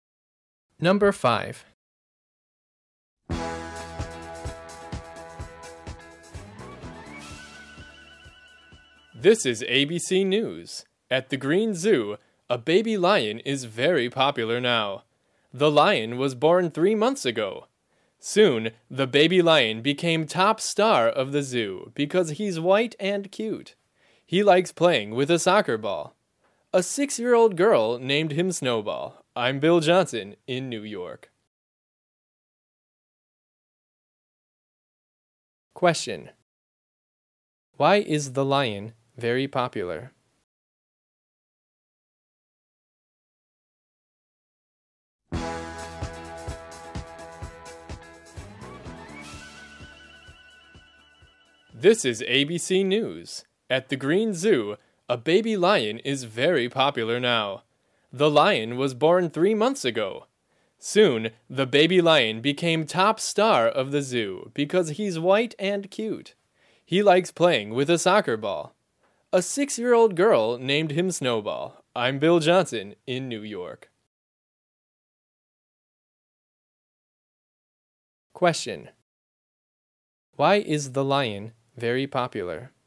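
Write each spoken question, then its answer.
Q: Why is the lion very popular?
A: Because he's white and cute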